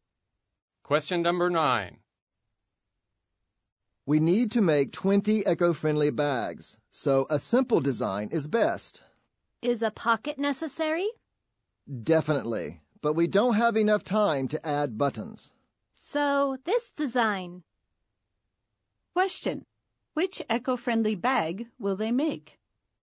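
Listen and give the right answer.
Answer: A simple bag with a pocket but no buttons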